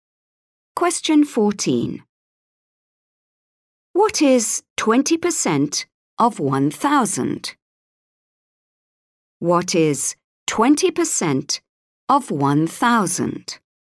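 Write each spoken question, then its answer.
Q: What is 20% of 1,000?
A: 200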